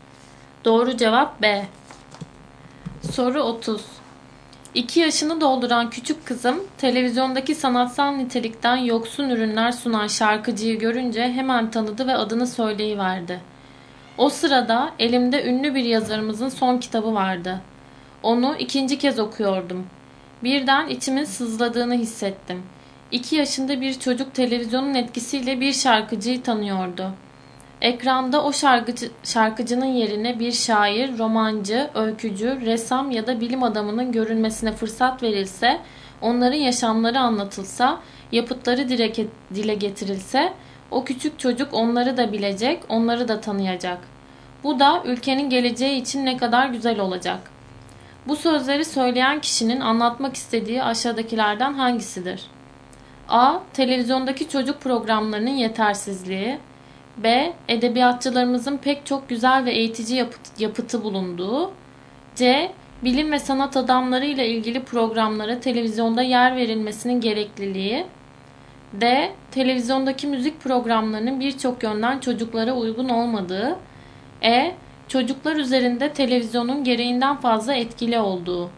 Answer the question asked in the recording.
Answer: Doğru cevap C.